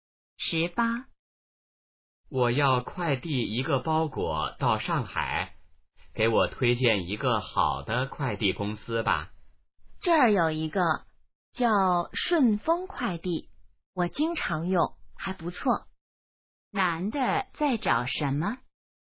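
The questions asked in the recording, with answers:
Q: 男的在找什么?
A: 好的快递公司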